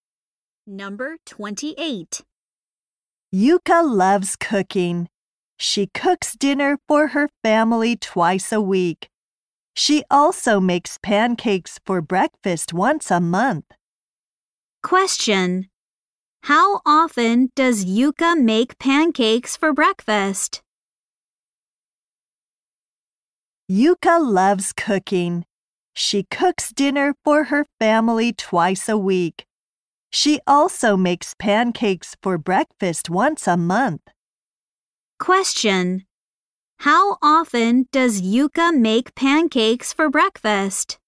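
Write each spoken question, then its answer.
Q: How often does Yuka make pancakes for breakfast?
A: Once a month.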